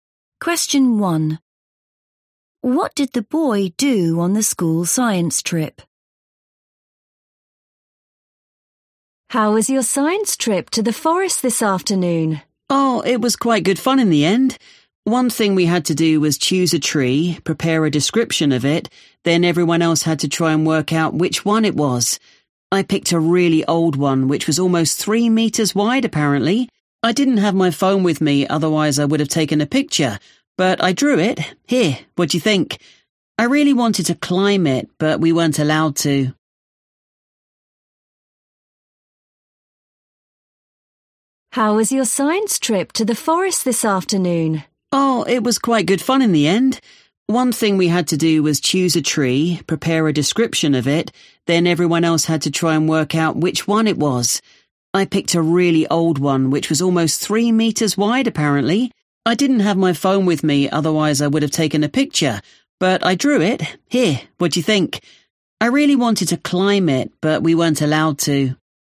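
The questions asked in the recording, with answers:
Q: What did the boy do on the school science trip?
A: He drew a picture of a very old tree.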